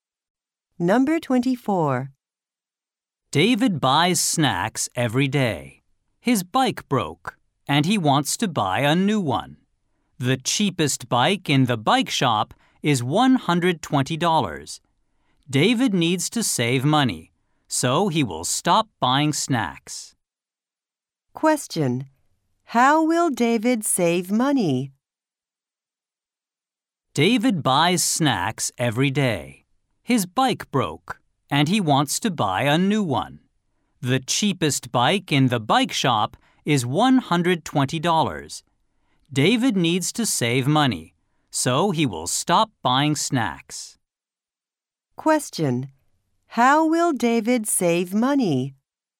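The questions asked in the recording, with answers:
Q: How will David save money?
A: He will stop buying snacks.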